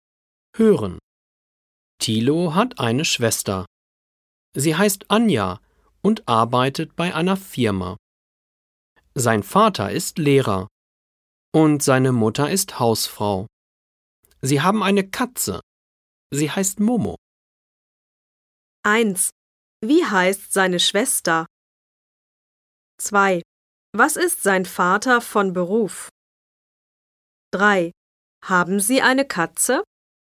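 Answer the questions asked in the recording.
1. Anja
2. Lehrer
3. Ja, sie heißt Momo.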